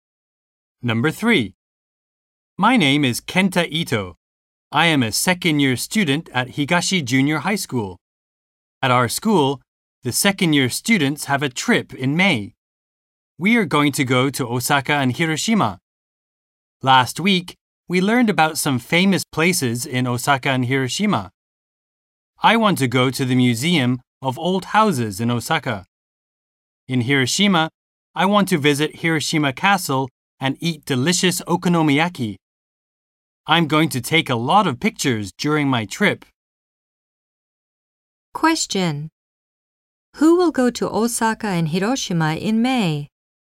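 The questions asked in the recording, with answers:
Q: Who will go to Osaka and Hiroshima in May?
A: The second-year students at Higashi Junior High School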